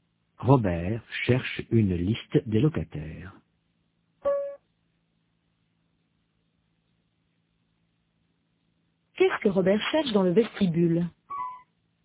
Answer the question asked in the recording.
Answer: Une liste des locataires.